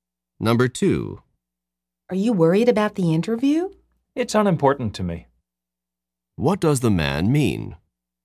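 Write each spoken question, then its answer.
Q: What does the man mean?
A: He isn't worried about the interview.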